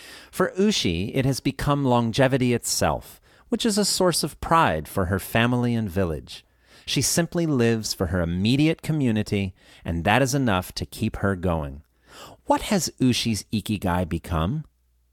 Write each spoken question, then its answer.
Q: What has Ushi's ikigai become?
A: Her ikigai has become longevity itself.